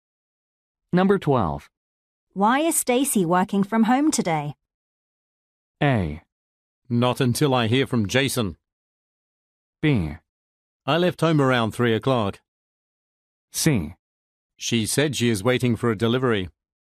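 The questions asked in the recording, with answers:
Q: Why is Stacy working from home today?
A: C: She said she is waiting for a delivery.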